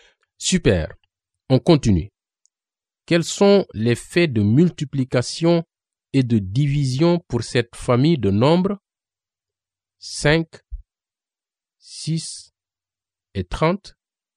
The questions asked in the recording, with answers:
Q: Quels sont les faits de multiplication et de division pour cette famille de nombres?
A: Les faits de multiplication sont 5 multiplié par 6 égale 30 et 6 multiplié par 5 égale 30.